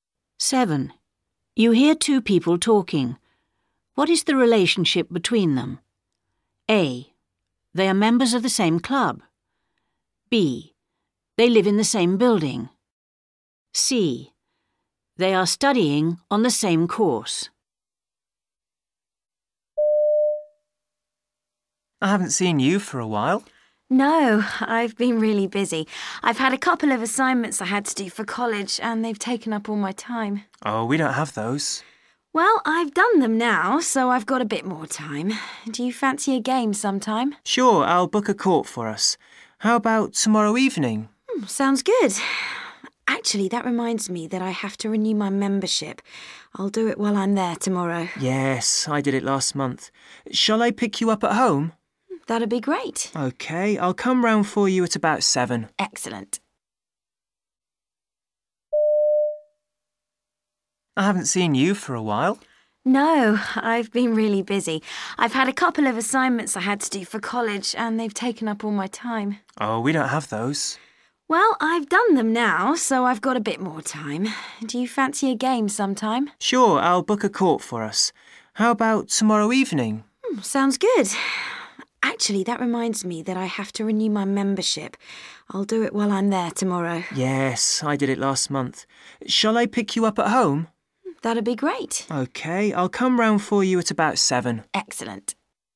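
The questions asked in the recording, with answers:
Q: What is the relationship between them?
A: A: They are members of the same club.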